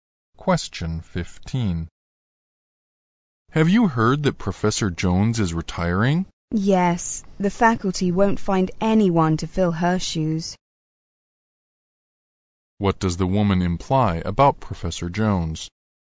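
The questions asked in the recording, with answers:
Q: What does the woman imply about Professor Jones?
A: She will be hard to replace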